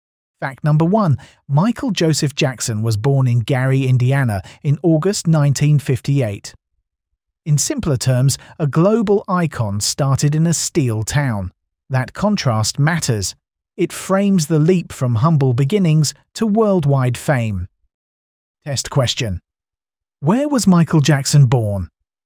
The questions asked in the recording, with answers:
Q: Where was Michael Jackson born?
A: Correct answer. Gary, Indiana.